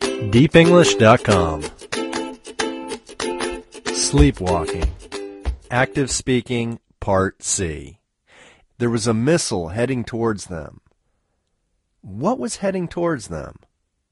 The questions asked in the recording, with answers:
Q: What was heading towards them?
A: A missile was heading towards them.